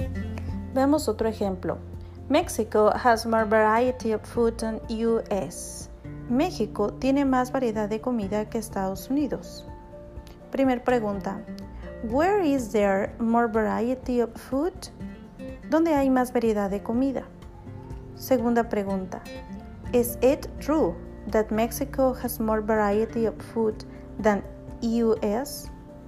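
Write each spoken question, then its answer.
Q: Where is there more variety of food?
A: Mexico

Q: Is it true that Mexico has more variety of food than US?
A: Yes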